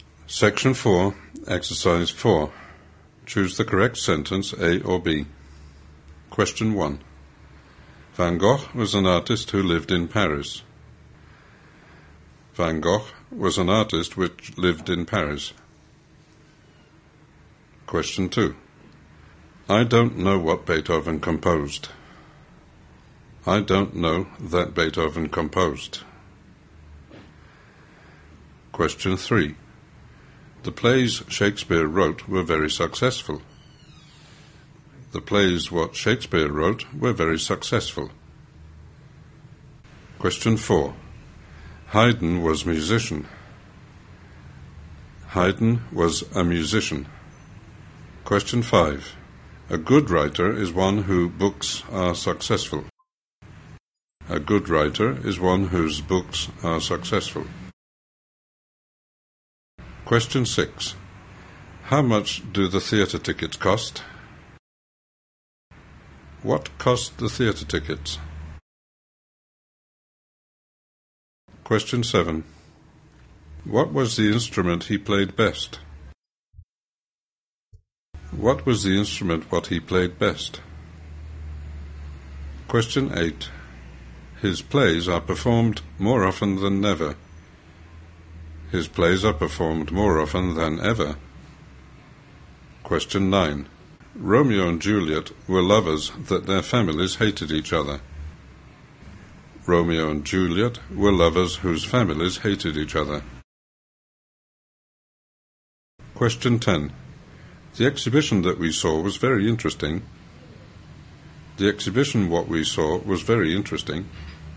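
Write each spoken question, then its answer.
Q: Van Gogh was an artist who lived in Paris.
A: A: Van Gogh was an artist who lived in Paris.

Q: I don't know what Beethoven composed.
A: A: I don't know what Beethoven composed.

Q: The plays Shakespeare wrote were very successful.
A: A: The plays Shakespeare wrote were very successful.

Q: How much do the theatre tickets cost?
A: A: How much do the theatre tickets cost?

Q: What was the instrument he played best?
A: A: What was the instrument he played best?

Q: His plays are performed more often than never.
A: B: His plays are performed more often than ever.

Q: Romeo and Juliet were lovers that their families hated each other.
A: B: Romeo and Juliet were lovers whose families hated each other.

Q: The exhibition that we saw was very interesting.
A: A: The exhibition that we saw was very interesting.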